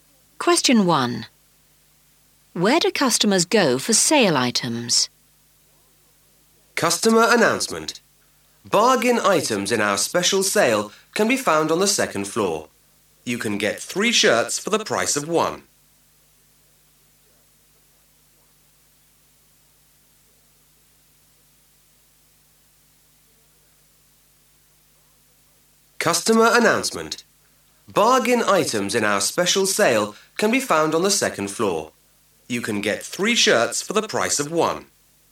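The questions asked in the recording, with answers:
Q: Where do customers go for sale items?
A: The second floor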